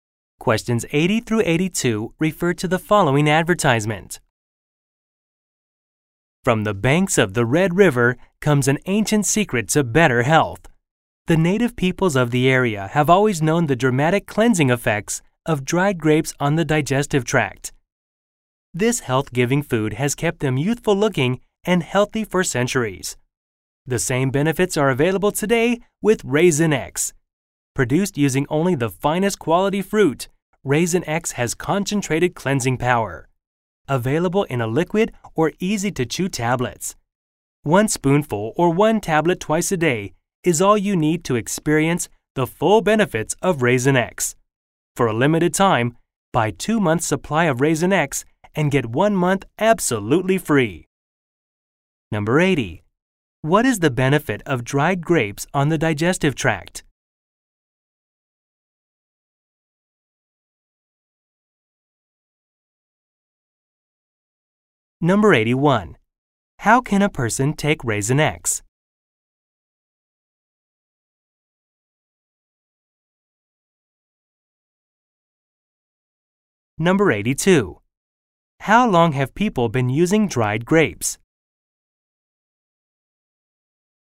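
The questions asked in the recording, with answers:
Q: What is the benefit of dried grapes on the digestive tract?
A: A cleansing effect

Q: How can a person take Raisin X?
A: As a liquid or chewable tablets

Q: How long have people been using dried grapes?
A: For centuries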